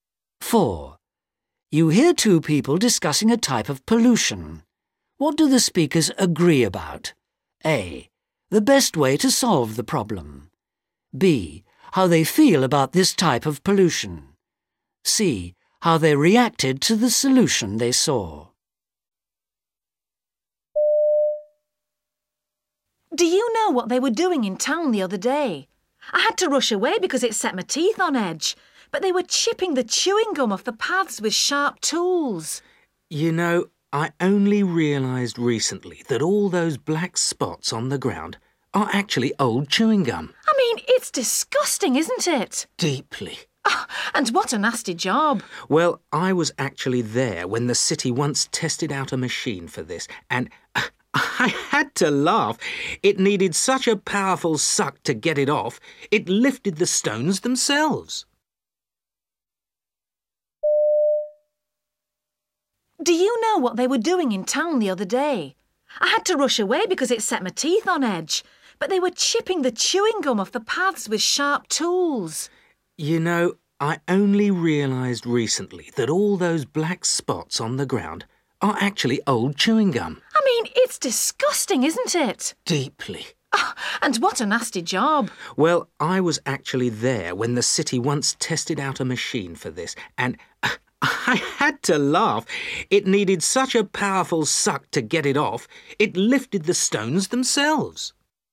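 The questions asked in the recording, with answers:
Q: What do the speakers agree about? A. The best way to solve the problem. B. How they feel about this type of pollution. C. How they reacted to the solution they saw.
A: B: How they feel about this type of pollution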